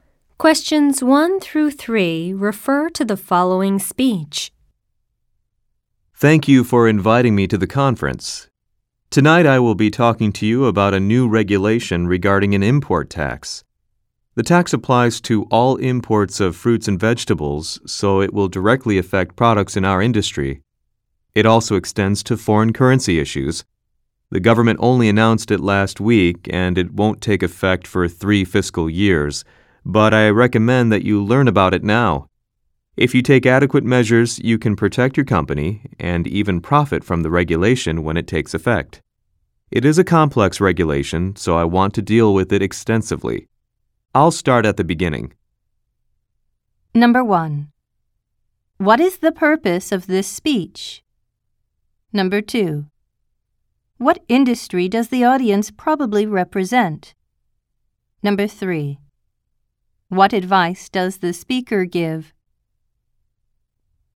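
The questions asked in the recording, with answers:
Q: What is the purpose of this speech?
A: To explain a new import tax regulation

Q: What industry does the audience probably represent?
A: The fruit and vegetable (produce) industry

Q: What advice does the speaker give?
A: Learn about the regulation now and take measures to prepare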